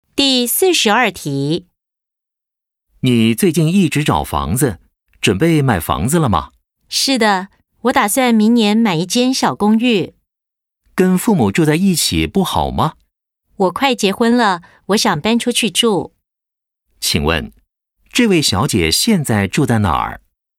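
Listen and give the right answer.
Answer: 跟父母住在一起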